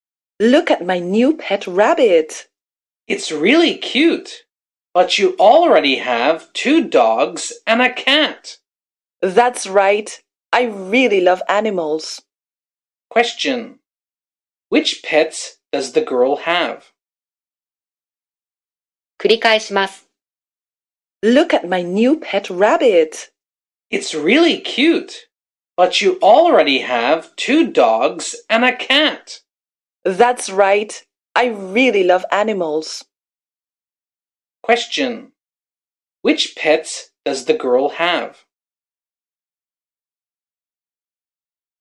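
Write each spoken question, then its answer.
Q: Which pets does the girl have?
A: A rabbit, two dogs and a cat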